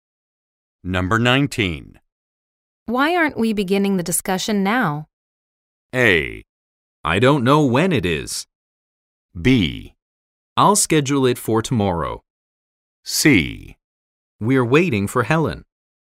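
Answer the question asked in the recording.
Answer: C: We're waiting for Helen.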